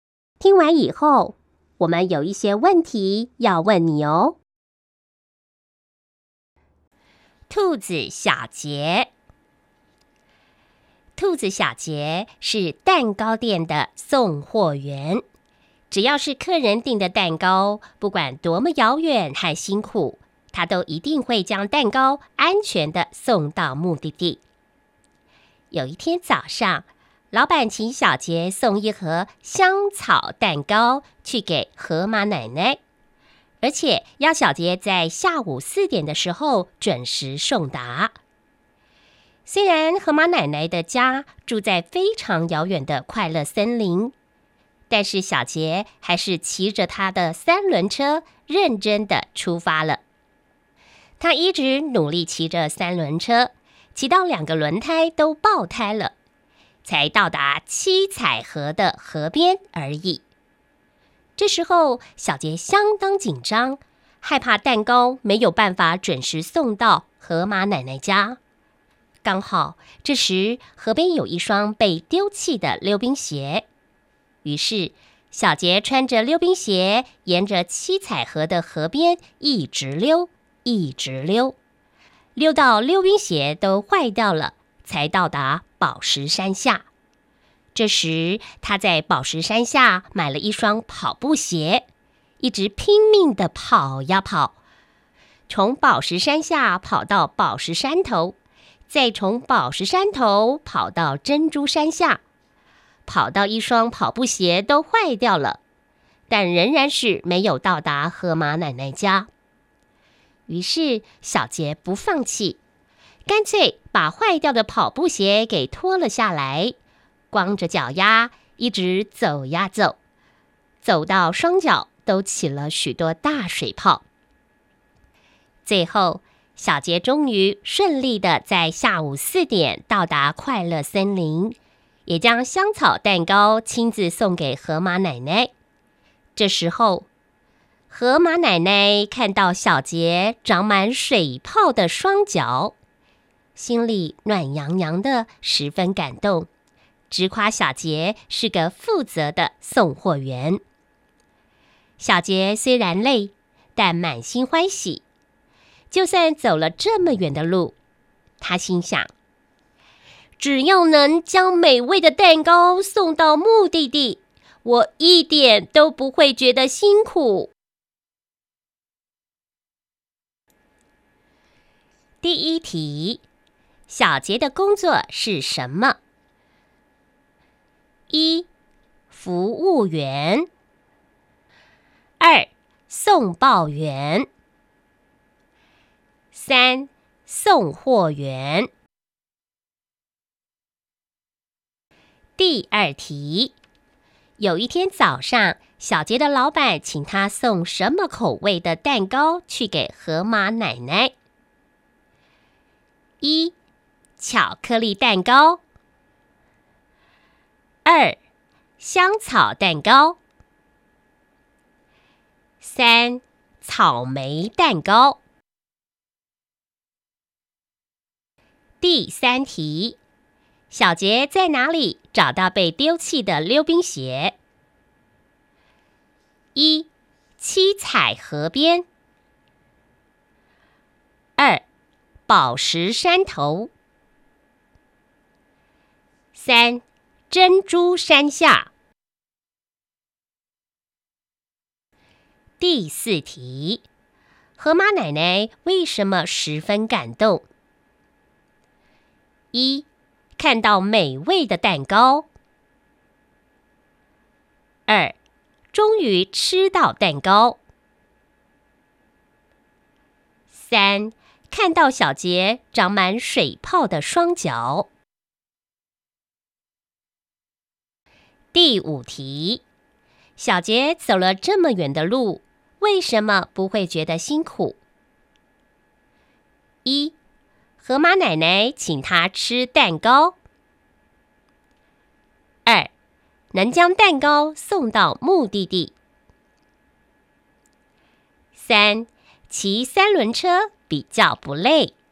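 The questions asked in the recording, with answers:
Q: 小杰的工作是什么?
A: 三: 送货员

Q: 有一天早上,小杰的老板请他送什么口味的蛋糕去给河马奶奶?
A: 二: 香草蛋糕

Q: 小杰在哪里找到被丢弃的溜冰鞋?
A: 一: 7彩河边

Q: 河马奶奶为什么十分感动?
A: 三: 看到小杰长满水泡的双脚

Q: 小杰走了这么远的路,为什么不会觉得辛苦?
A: 二: 能将蛋糕送到目的地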